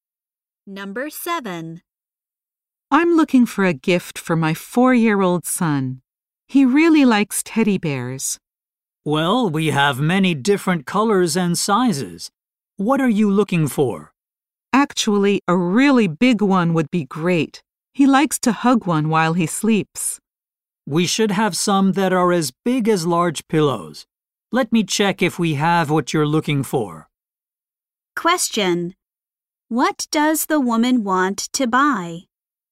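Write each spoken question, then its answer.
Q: What does the woman want to buy?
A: A big teddy bear for her son.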